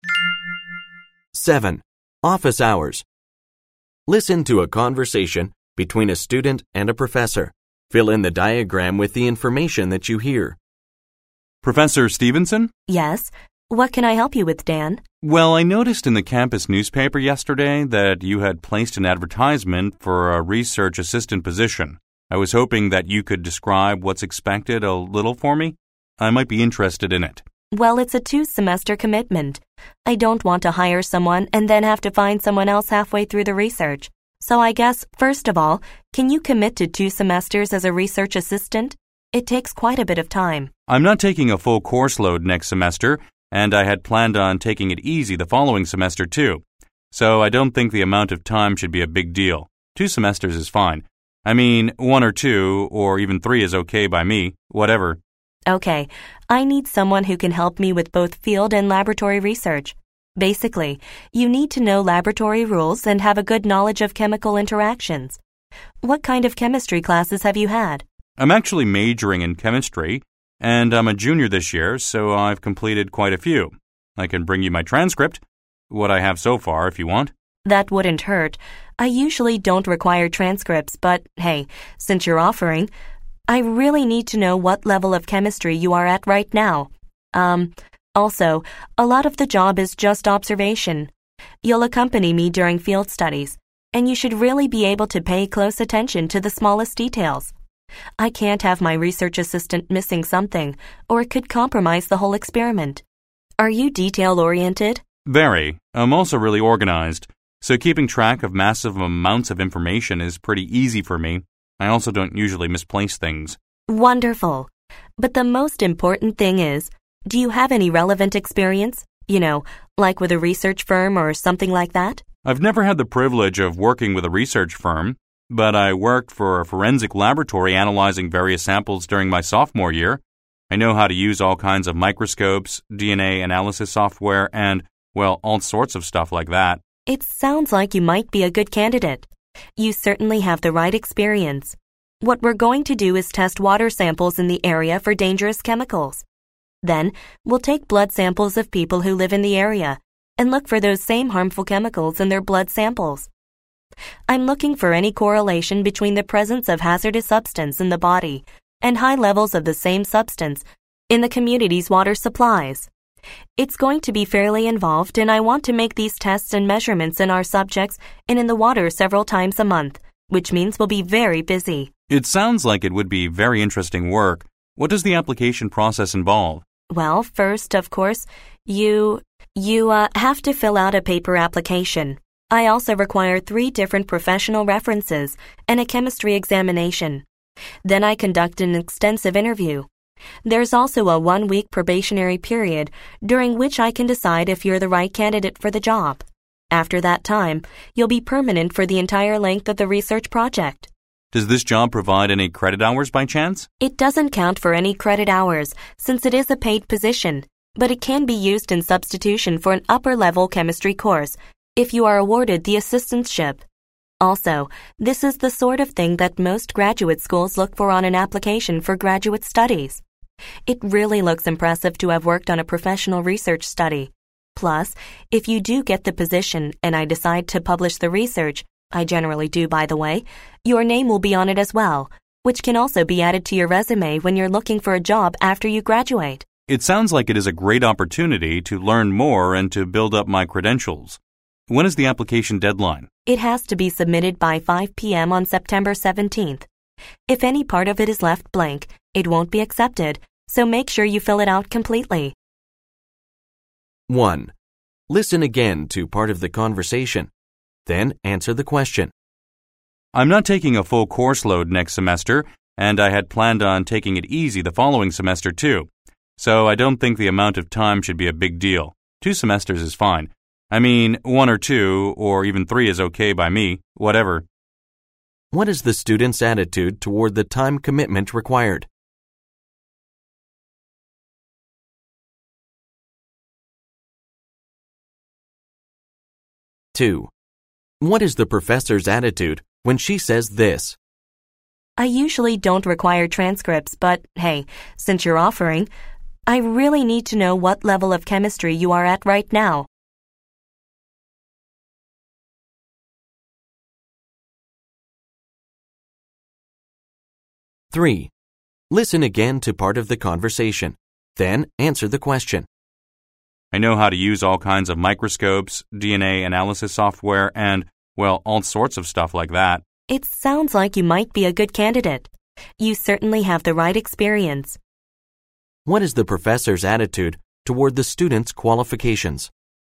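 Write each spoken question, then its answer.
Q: What is the student's attitude toward the time commitment required?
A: He isn't worried about it; he's flexible and can easily commit to two semesters or more

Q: What is the professor's attitude toward the student's qualifications?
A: She's impressed and thinks he has the right experience and might be a good candidate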